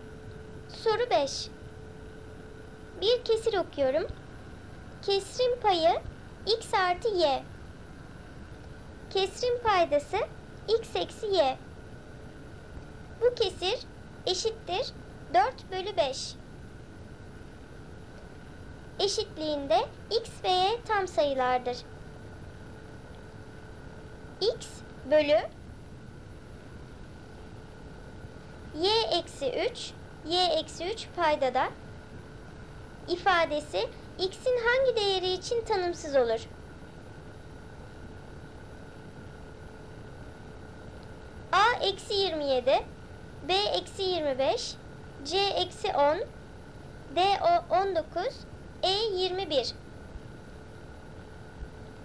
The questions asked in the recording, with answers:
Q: y eksi 3 y eksi 3 paydada ifadesi x'in hangi değeri için tanımsız olur?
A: Dolayısıyla cevap A eksi 27.